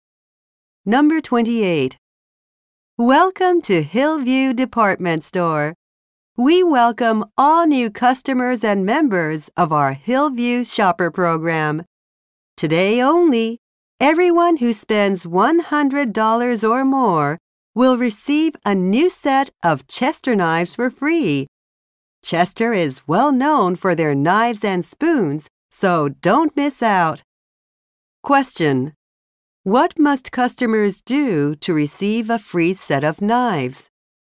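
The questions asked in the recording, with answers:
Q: What must customers do to receive a free set of knives?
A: Spend $100 or more today.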